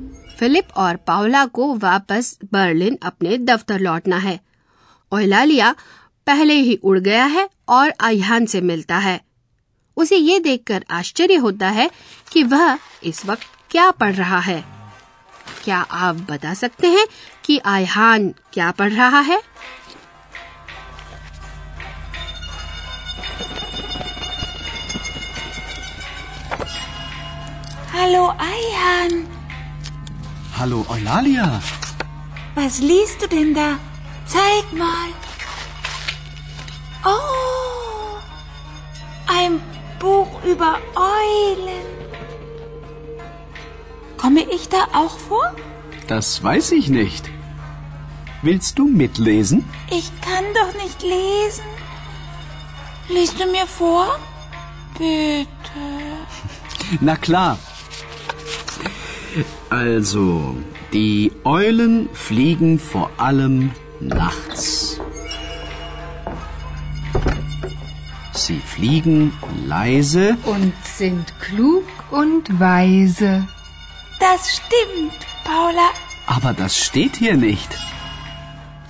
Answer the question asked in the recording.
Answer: Oh, ein Buch über Eulen.